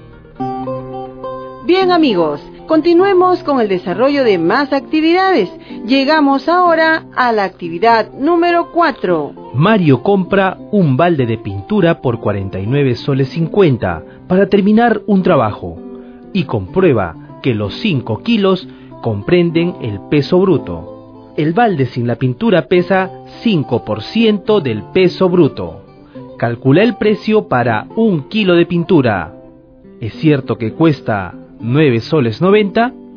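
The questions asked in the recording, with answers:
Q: ¿Es cierto que cuesta 9 soles 90?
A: No: un kilo cuesta unos 10,42 soles (49,50 ÷ 4,75 kg de pintura)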